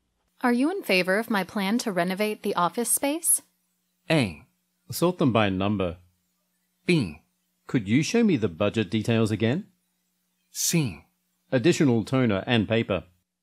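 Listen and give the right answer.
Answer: B: Could you show me the budget details again?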